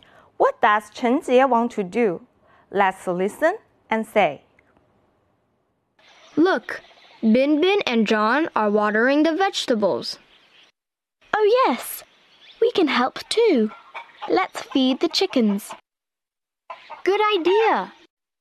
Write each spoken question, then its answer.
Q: What does 陈杰want to do?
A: She wants to feed chickens.